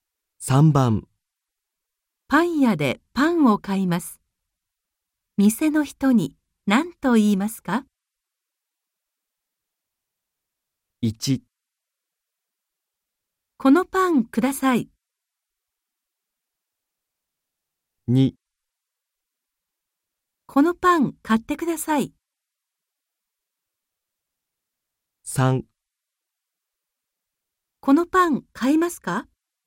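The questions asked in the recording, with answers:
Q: パン屋でパンを買います。店の人に何と言いますか?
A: 1: このパンください。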